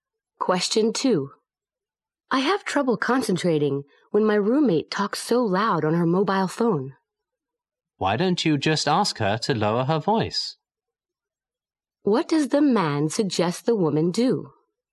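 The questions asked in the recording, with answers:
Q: What does the man suggest the woman do?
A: Ask her roommate to lower her voice.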